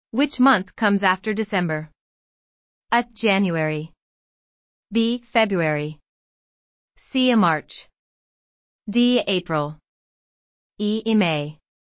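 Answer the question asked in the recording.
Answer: A: January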